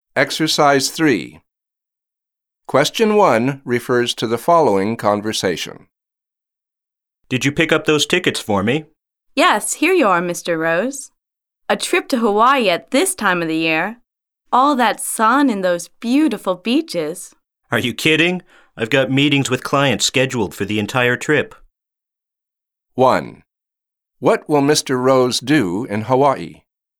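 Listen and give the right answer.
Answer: Meet with clients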